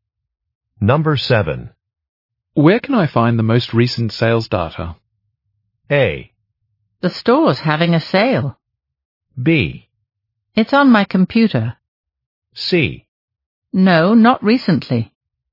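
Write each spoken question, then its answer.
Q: Where can I find the most recent sales data?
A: B: It's on my computer.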